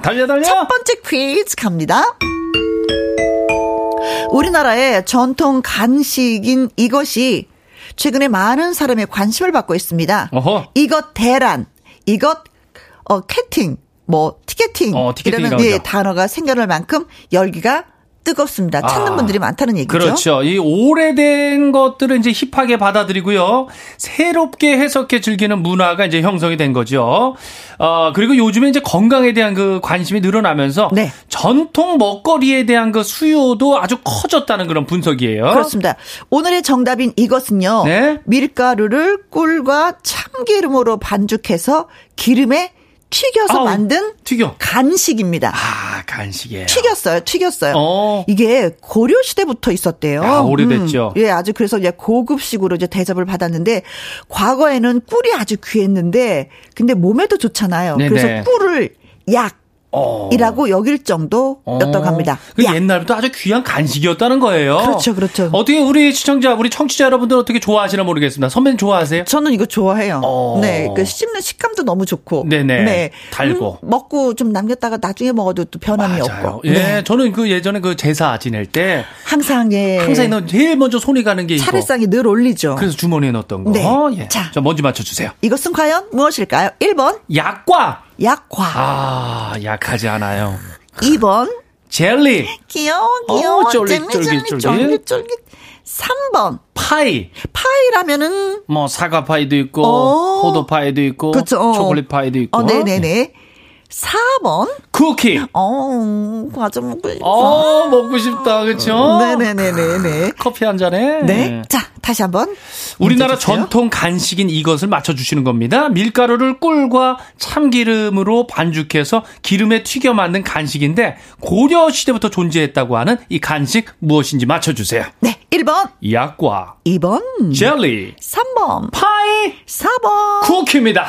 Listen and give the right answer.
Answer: 1번 약과가 정답입니다.